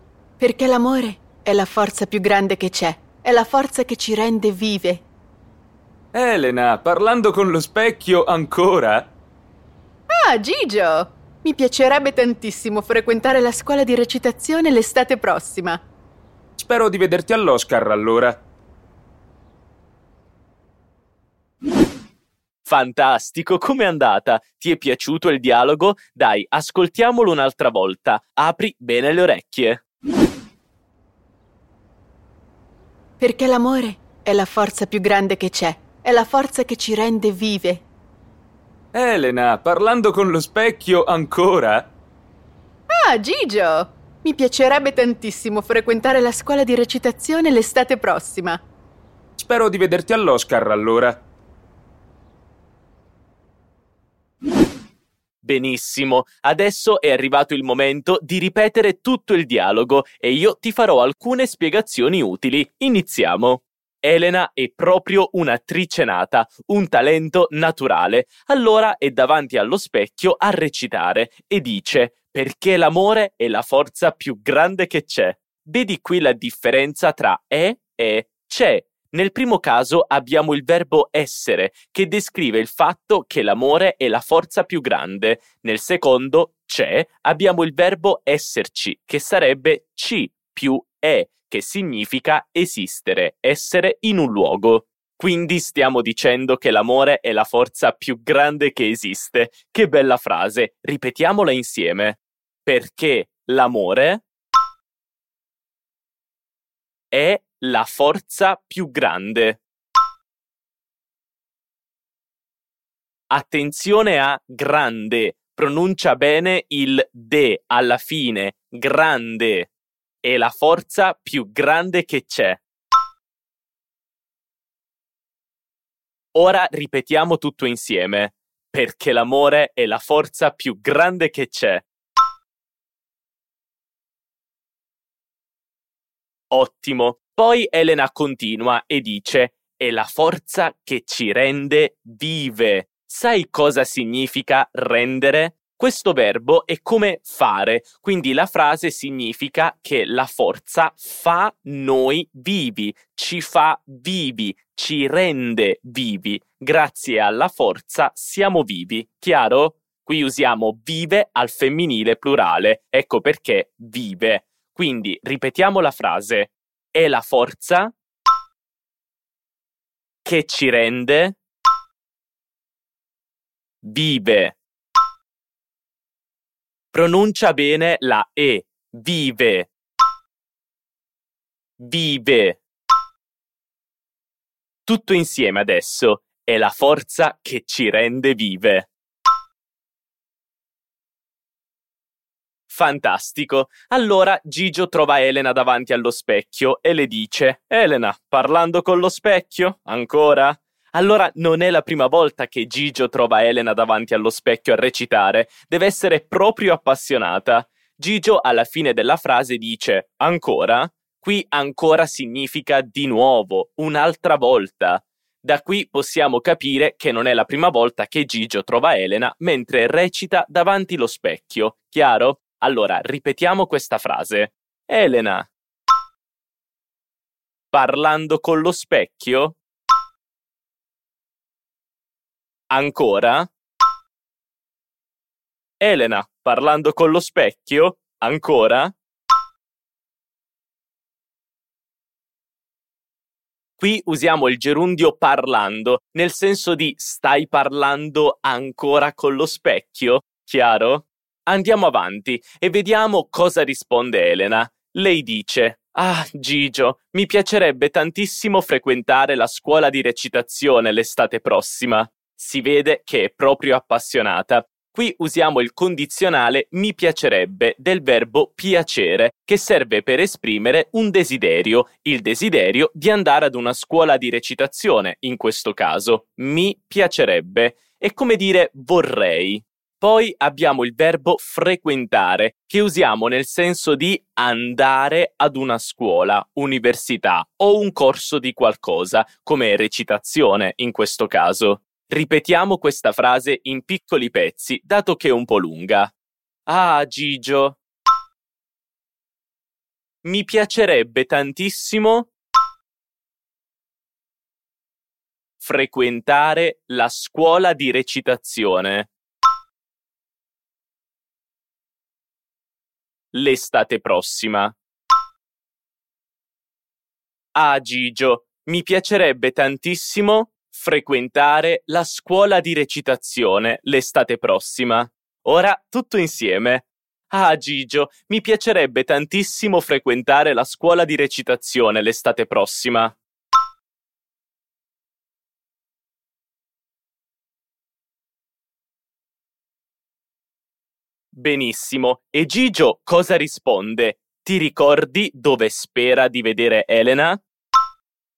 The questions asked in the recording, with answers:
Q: Ti ricordi dove spera di vedere Elena?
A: spera di vedere Elena alla cerimonia degli Oscar in futuro